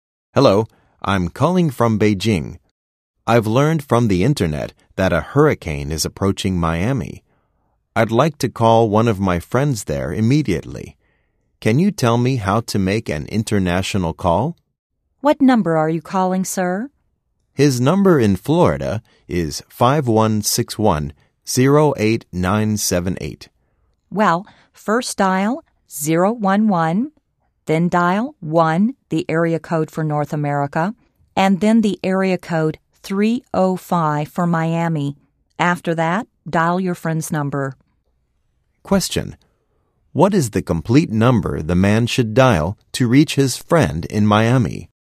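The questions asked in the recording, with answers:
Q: What is the complete number the man should dial to reach his friend in Miami?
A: 011-1-305-5161-08978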